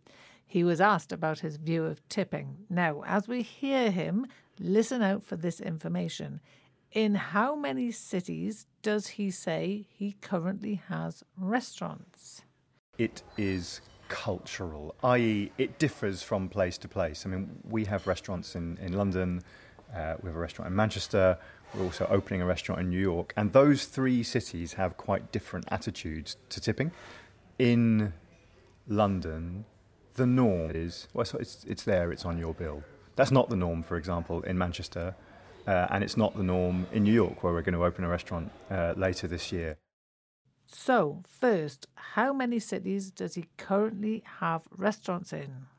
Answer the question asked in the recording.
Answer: That would be two, London and Manchester.